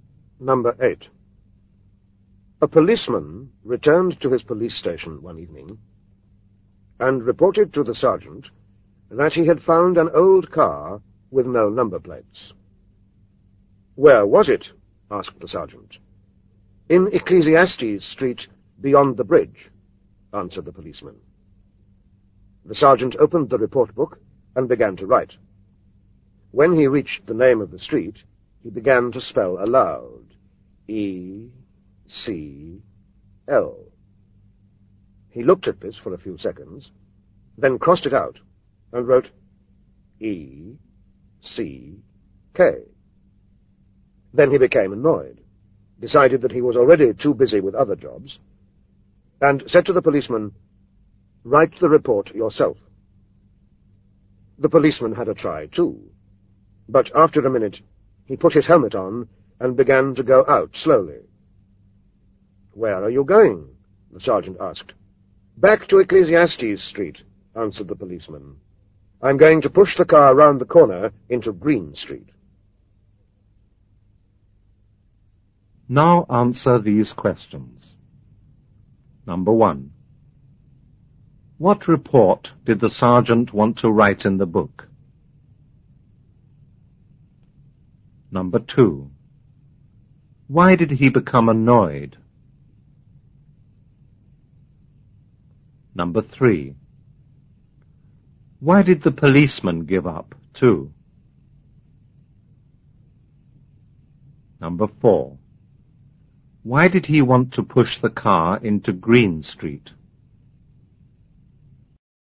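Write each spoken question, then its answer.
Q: What report did the sergeant want to write in the book?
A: About an old car with no number plates found in Ecclesiastes Street

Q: Why did he become annoyed?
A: He couldn't spell the name of the street

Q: Why did the policeman give up, too?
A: He couldn't spell Ecclesiastes either

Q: Why did he want to push the car into Green Street?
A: Because Green Street is easy to spell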